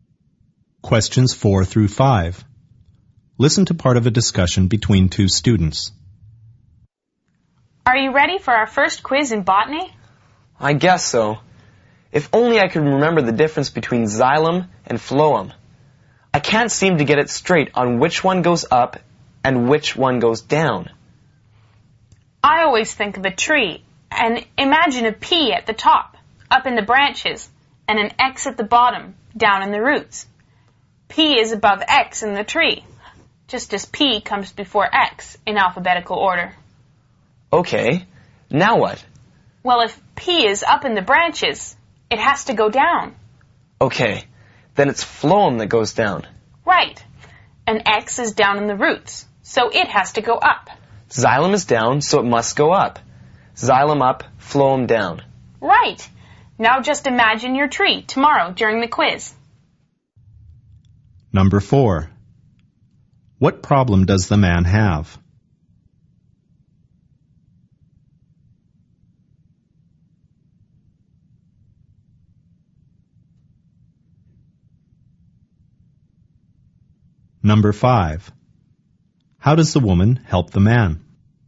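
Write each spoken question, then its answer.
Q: What problem does the man have?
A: He can't remember the difference between xylem and phloem

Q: How does the woman help the man?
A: She gives him a memory trick: picture a tree with P at the top and X at the bottom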